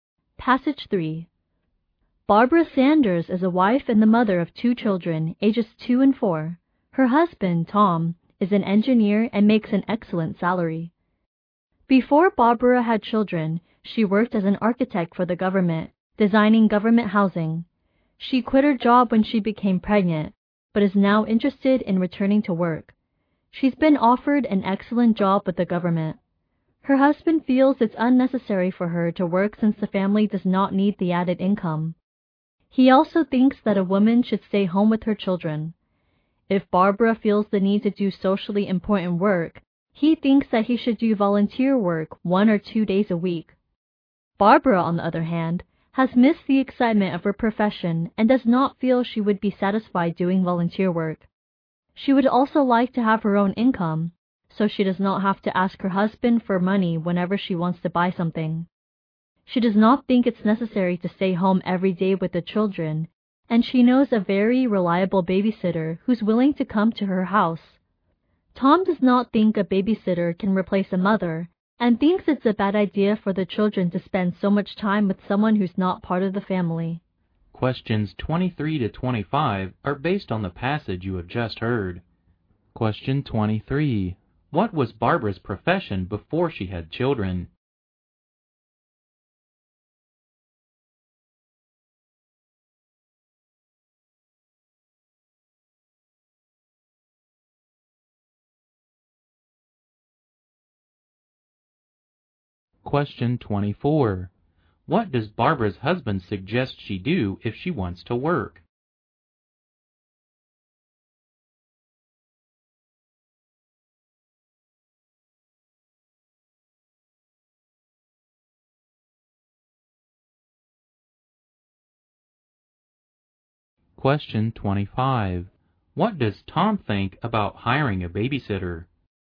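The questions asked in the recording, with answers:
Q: What was Barbara's profession before she had children?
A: An architect for the government.

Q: What does Barbara's husband suggest she do if she wants to work?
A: Do volunteer work one or two days a week.

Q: What does Tom think about hiring a babysitter?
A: A babysitter can't replace a mother; it's bad for the children.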